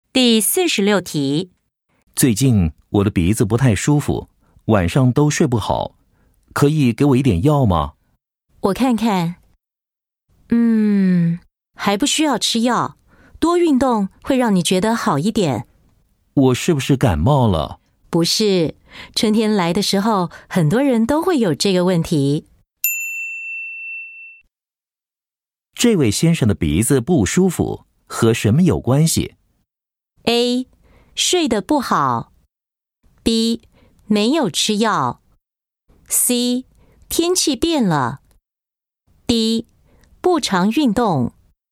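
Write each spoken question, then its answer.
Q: 这位先生的鼻子不舒服,和什么有关系?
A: C: 天气变了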